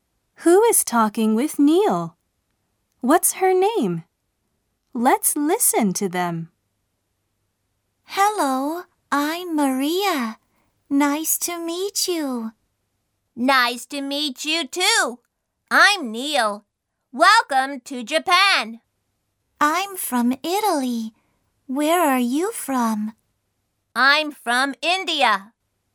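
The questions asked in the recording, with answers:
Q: What's her name?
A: Maria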